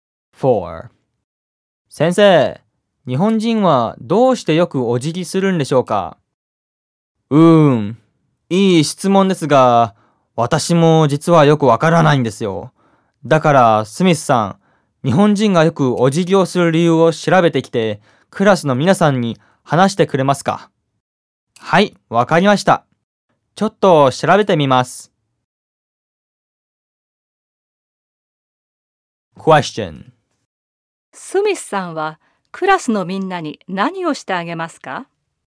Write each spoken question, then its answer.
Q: スミスさんは、クラスのみんなに何をしてあげますか?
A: スミスさんはクラスのみんなに日本人がお辞儀をする理由を調べて話してあげます。